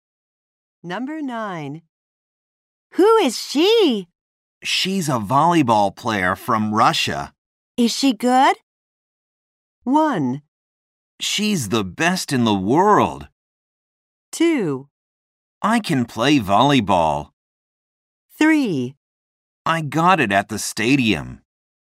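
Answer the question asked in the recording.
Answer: 1: She's the best in the world.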